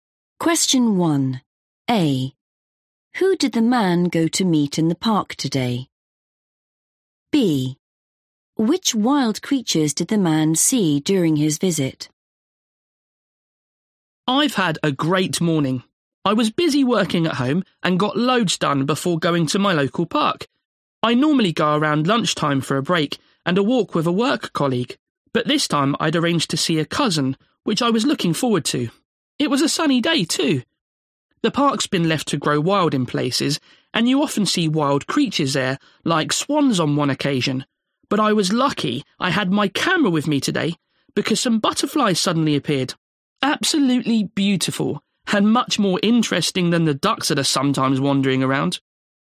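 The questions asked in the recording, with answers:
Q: Who did the man go to meet in the park today?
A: a cousin

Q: Which wild creatures did the man see during his visit?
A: butterflies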